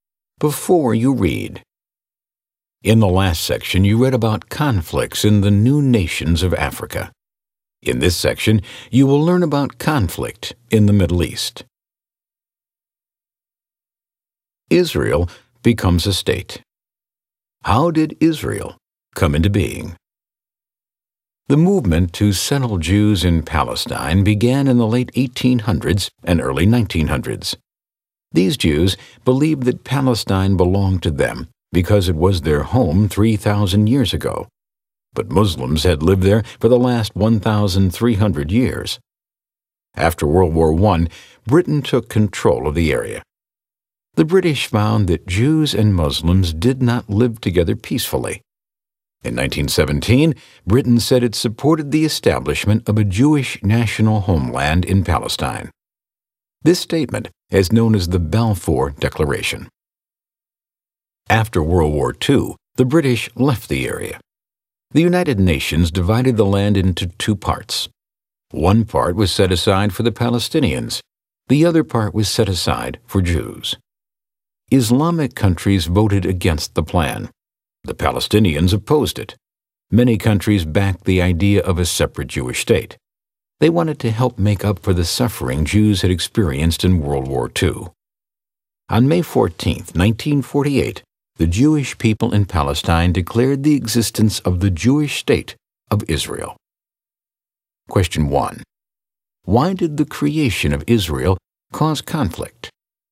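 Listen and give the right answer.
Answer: Palestinians and Islamic countries opposed dividing the land, since Muslims had lived there for 1,300 years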